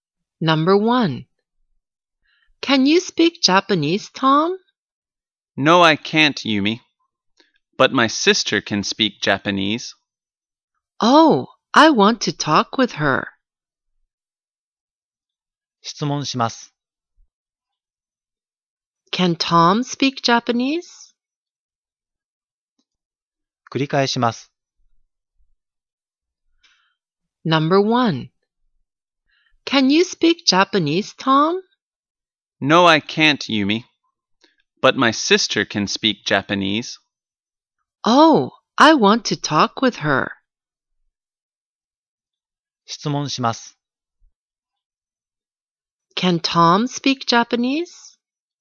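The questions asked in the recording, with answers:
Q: Can Tom speak Japanese?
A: No, he can't.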